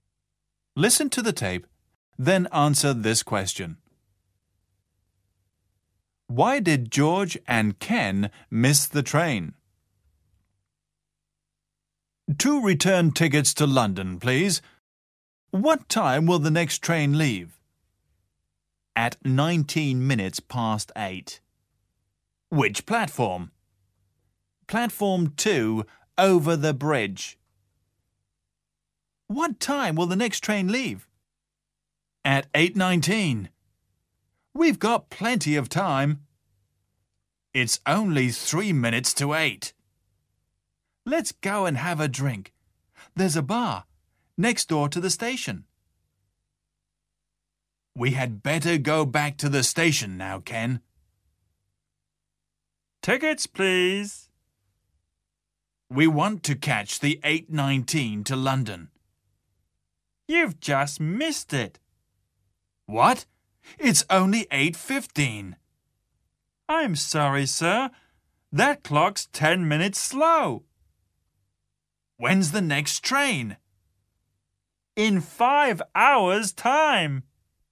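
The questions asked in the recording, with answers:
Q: Why did George and Ken miss the train?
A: Because the clock in the bar was 10 minutes slow.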